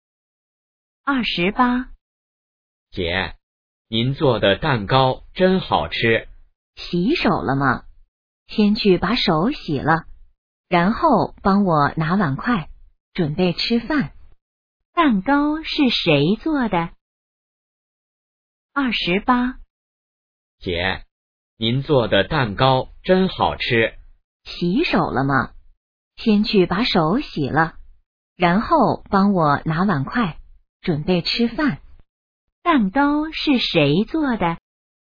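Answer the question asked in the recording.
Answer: 姐姐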